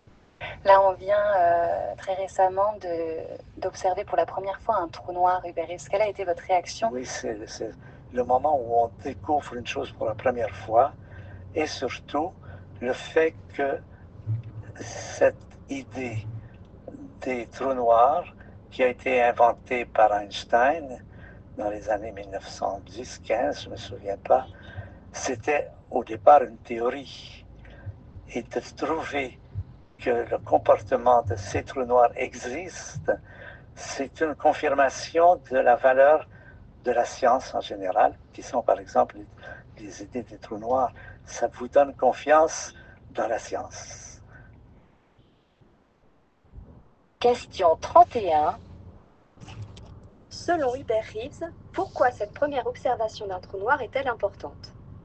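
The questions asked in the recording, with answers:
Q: Selon Hubert Reeves, pourquoi cette première observation d'un trou noir est-elle importante?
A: Elle confirme une théorie (d'Einstein) et donne confiance dans la valeur de la science.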